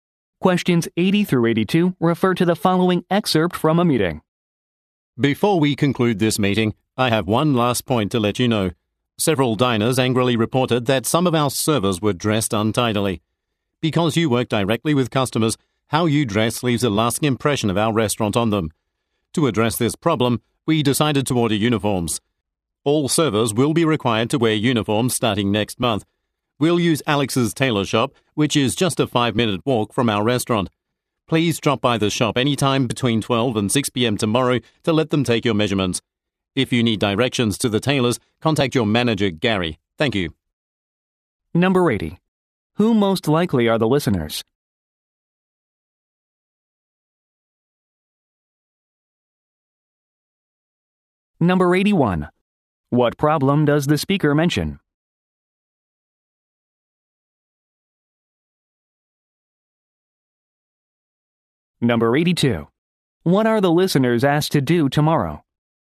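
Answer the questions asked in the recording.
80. Restaurant servers
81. Some servers were dressed untidily
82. Visit the tailor shop to get measured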